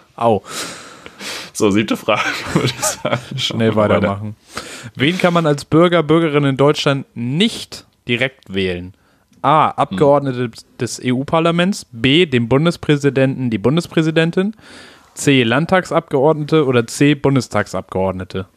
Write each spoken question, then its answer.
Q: Wen kann man als Bürger, Bürgerin in Deutschland nicht direkt wählen?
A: B, dem Bundespräsidenten.